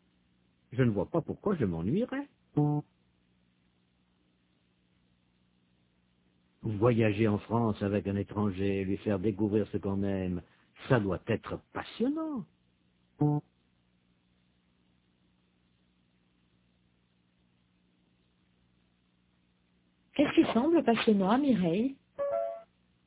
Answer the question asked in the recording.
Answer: Voyager en France avec un étranger, lui faire découvrir ce qu'on aime.